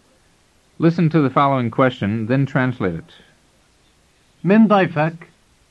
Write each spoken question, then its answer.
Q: Listen to the following question, then translate it.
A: It means, who is your guest?